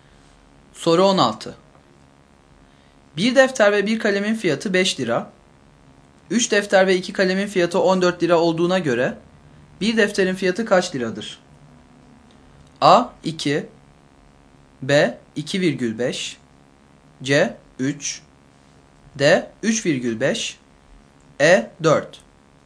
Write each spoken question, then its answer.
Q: 3 defter ve 2 kalemin fiyatı 14 lira olduğuna göre bir defterin fiyatı kaç liradır?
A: Doğru yanıt E şıkkı.